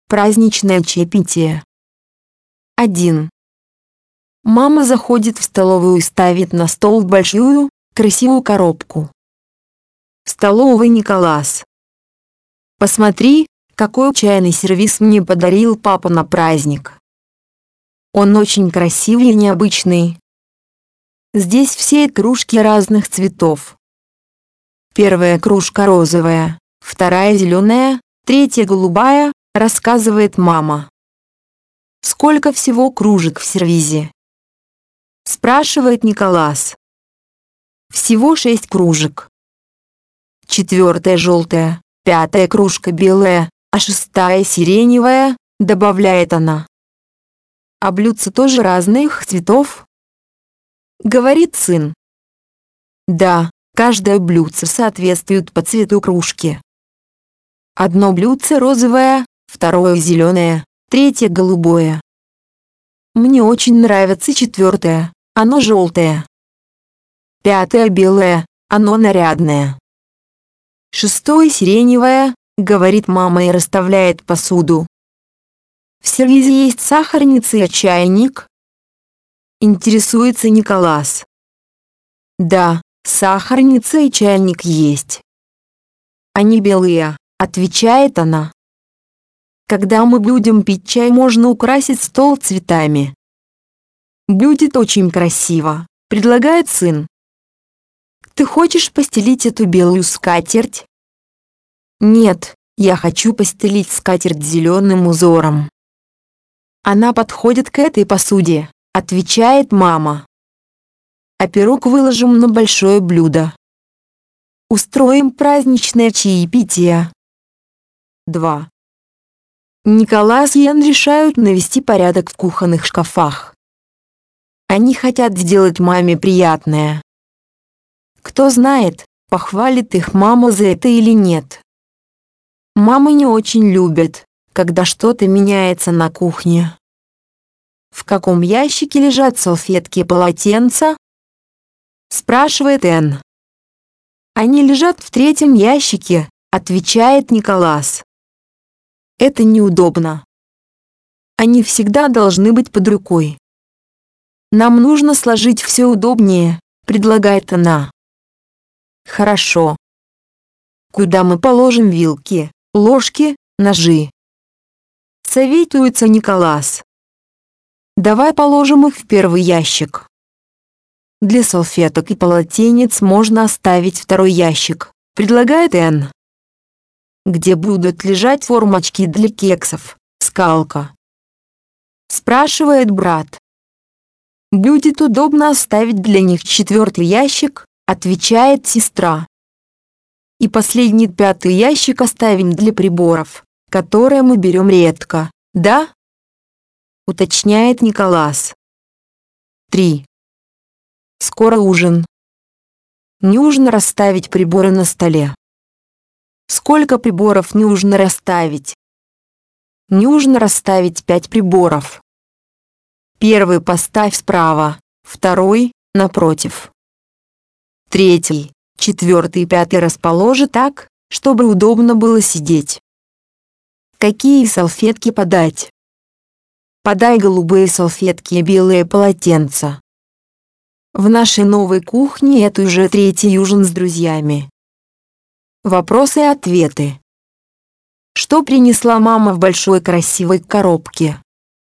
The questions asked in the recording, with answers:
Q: Что принесла мама в большой красивой коробке?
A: Она принесла в коробке чайный сервиз.